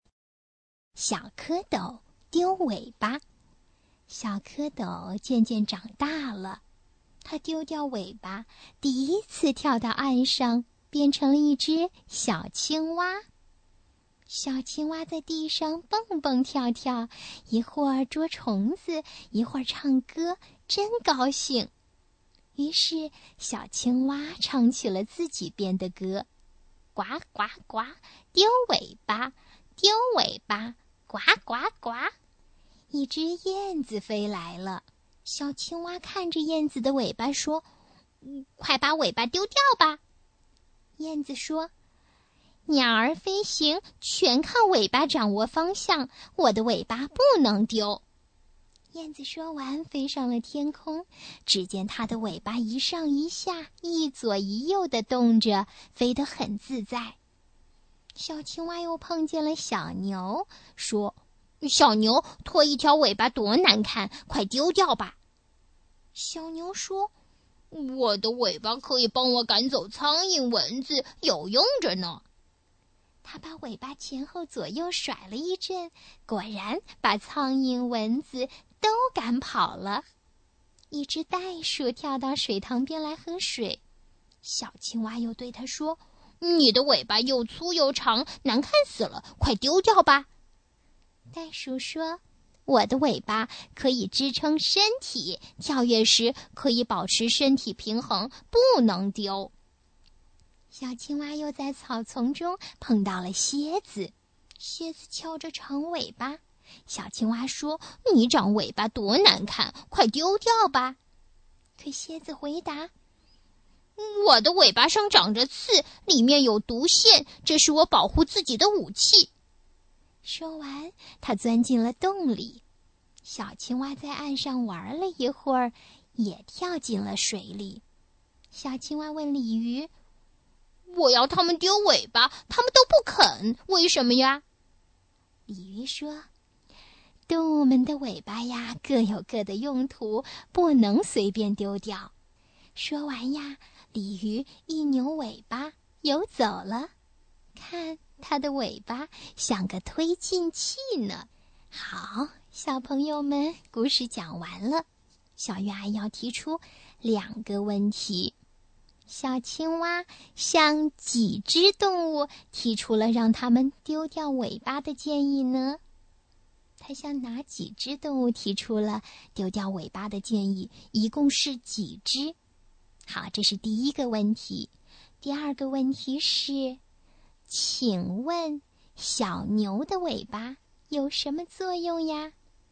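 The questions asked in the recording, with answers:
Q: 小青蛙向几只动物提出了让它们丢掉尾巴的建议呢?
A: 四只:燕子、小牛、袋鼠、蝎子

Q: 请问小牛的尾巴有什么作用呀?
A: 可以赶走苍蝇蚊子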